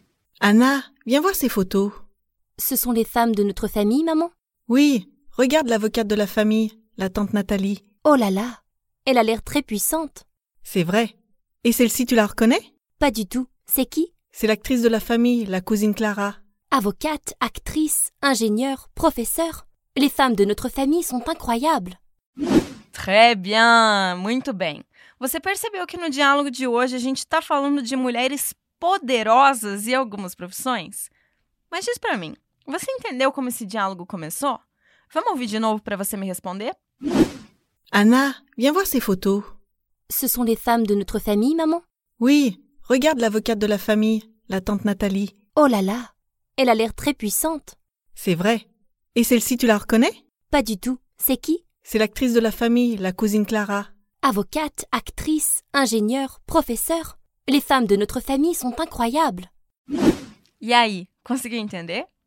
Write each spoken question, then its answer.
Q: Mas diz para mim, você entendeu como esse diálogo começou?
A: O diálogo começa com uma mãe chamando a sua filha, Anna, para mostrar uma coisinha para ela.